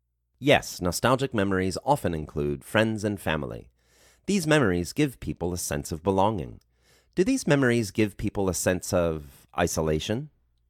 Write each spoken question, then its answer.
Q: Do these memories give people a sense of isolation?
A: No, these memories do not give people a sense of isolation.